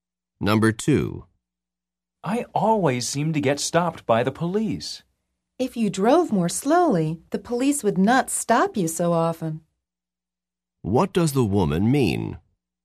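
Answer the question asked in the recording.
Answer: The man drives too fast.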